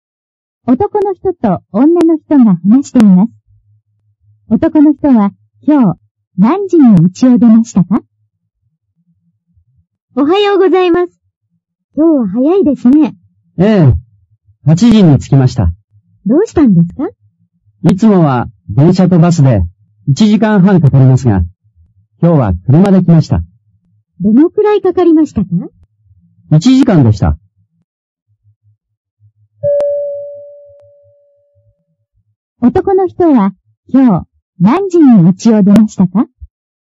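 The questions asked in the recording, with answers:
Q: 男の人は今日何時に家を出ましたか?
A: 7時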